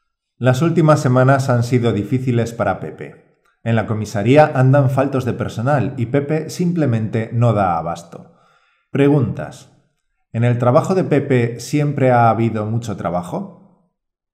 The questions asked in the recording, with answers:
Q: ¿En el trabajo de Pepe siempre ha habido mucho trabajo?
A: No lo sabemos. Lo que sí sabemos es que las últimas semanas han sido especialmente difíciles para Pepe.